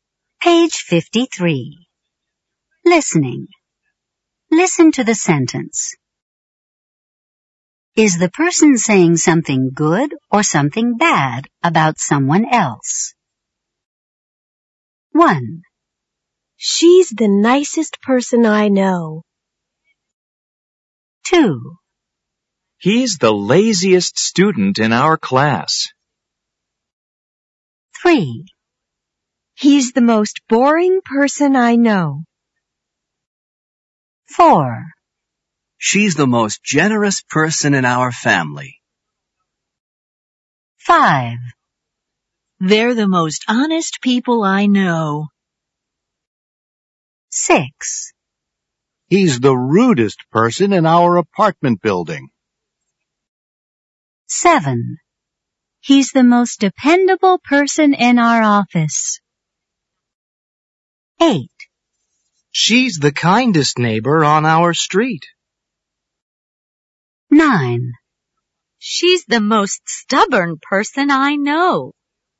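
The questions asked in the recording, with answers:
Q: She's the nicest person I know.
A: good

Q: He's the laziest student in our class.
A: bad

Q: He's the most boring person I know.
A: bad

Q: She's the most generous person in our family.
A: good

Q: They're the most honest people I know.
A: good

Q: He's the rudest person in our apartment building.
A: bad

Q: He's the most dependable person in our office.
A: good

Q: She's the kindest neighbor on our street.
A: good

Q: She's the most stubborn person I know.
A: bad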